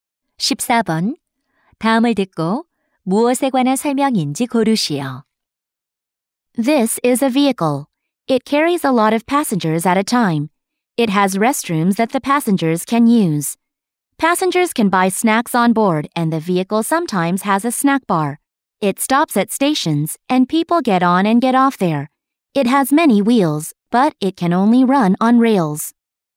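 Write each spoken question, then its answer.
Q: 다음을 듣고 무엇에 관한 설명인지 고르시오.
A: 기차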